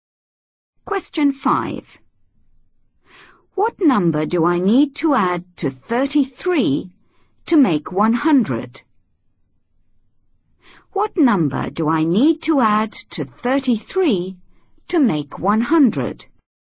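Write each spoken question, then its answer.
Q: What number do I need to add to 33 to make 100?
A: 67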